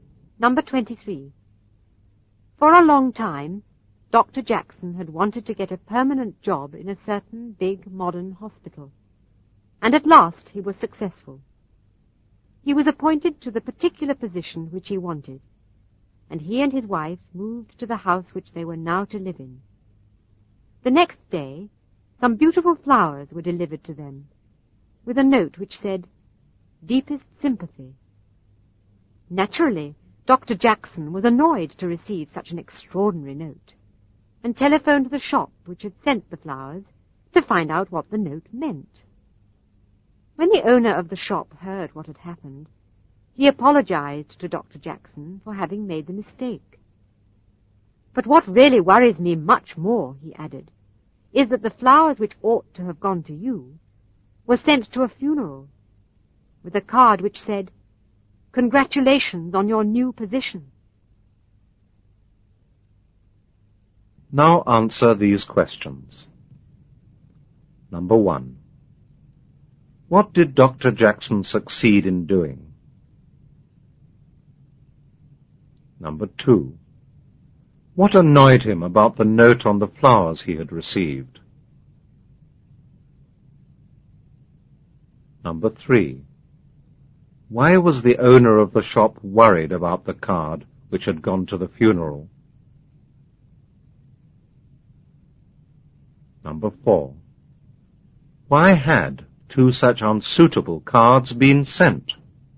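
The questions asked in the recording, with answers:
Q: What did Dr. Jackson succeed in doing?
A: Getting a permanent job in a big modern hospital

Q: What annoyed him about the note on the flowers he had received?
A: It said "Deepest sympathy", which made no sense for him

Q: Why was the owner of the shop worried about the card which had gone to the funeral?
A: It said 'Congratulations on your new position', which was wrong for a funeral

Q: Why had two such unsuitable cards been sent?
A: The shop mixed up the cards, so each went with the wrong flowers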